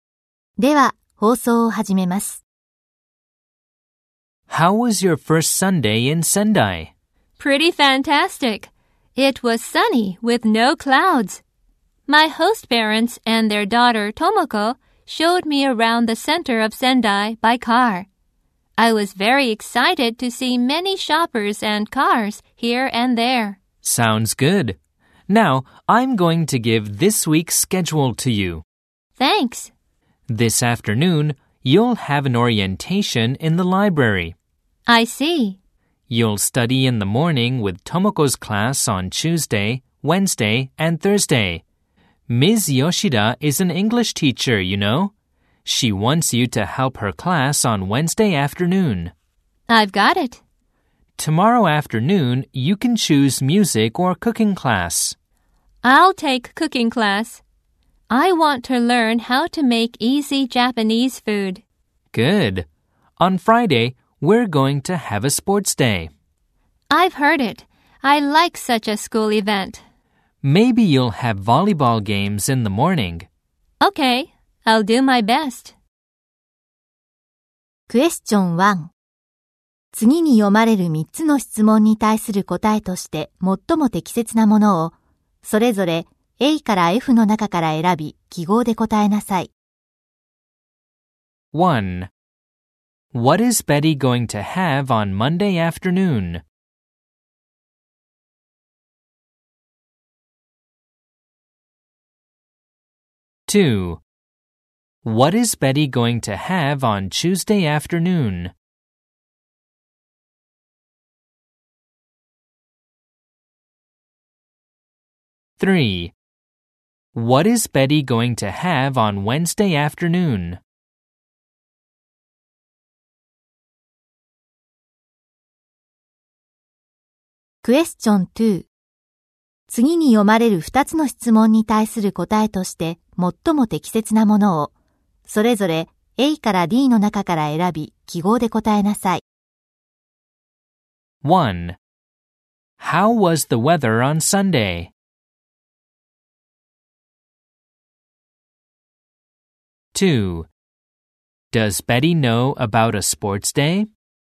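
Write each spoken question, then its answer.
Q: What is Betty going to have on Monday afternoon?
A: An orientation in the library

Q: What is Betty going to have on Tuesday afternoon?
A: Cooking class

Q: What is Betty going to have on Wednesday afternoon?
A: Helping Ms. Yoshida's English class

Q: How was the weather on Sunday?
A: It was sunny with no clouds

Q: Does Betty know about a sports day?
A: Yes, she does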